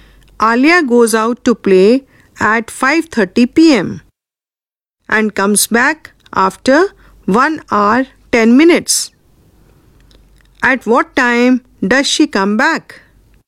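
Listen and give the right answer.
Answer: 6:40 p.m.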